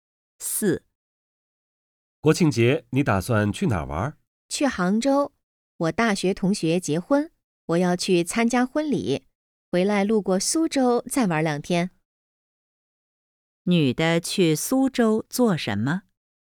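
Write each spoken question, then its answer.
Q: 女的去苏州做什么?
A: 玩两天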